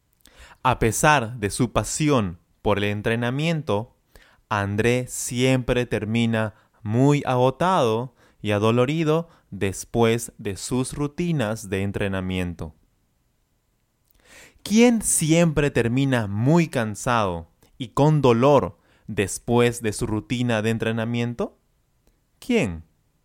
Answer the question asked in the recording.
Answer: André. André siempre termina agotado y adolorido después de su rutina de entrenamiento.